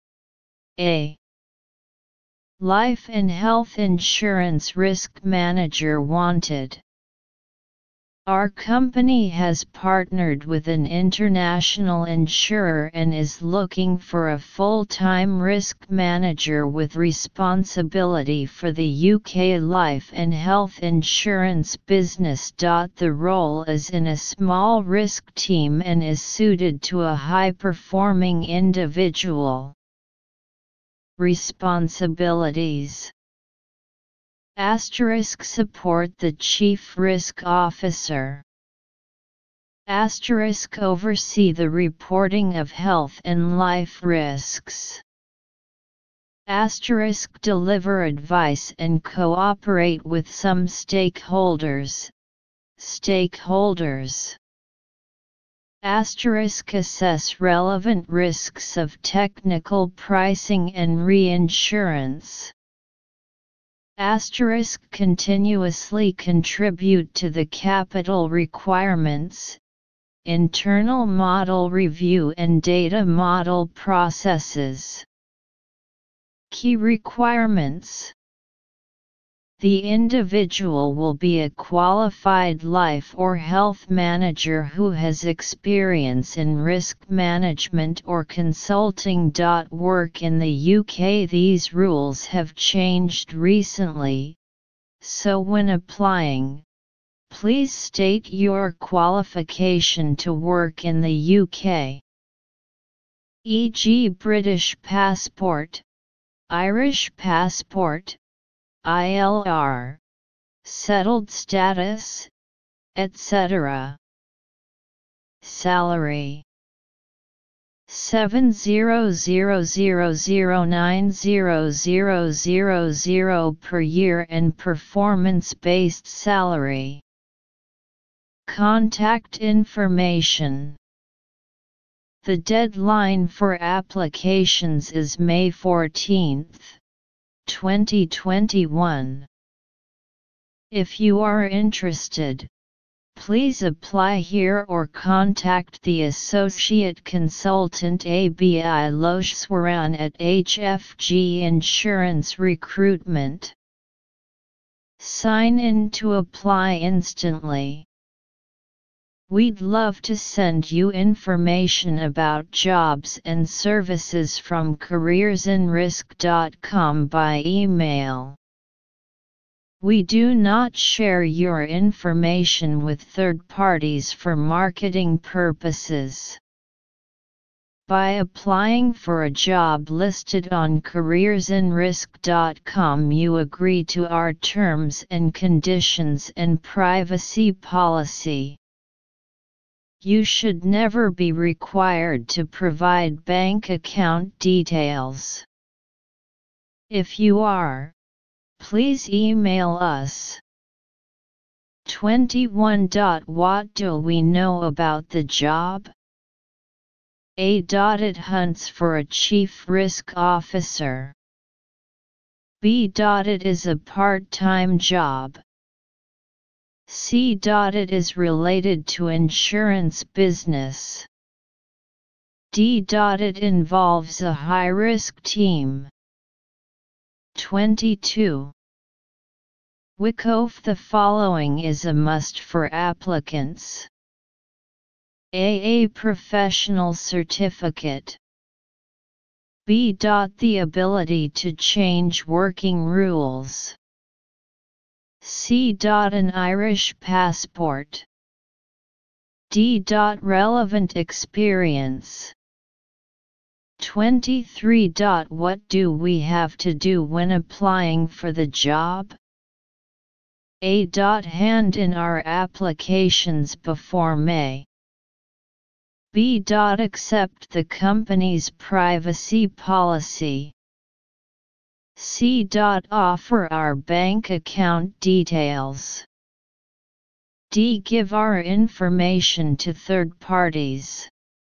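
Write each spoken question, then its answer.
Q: What do we know about the job?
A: C: It is related to insurance business.

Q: What do we have to do when applying for the job?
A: B: Accept the company's privacy policy.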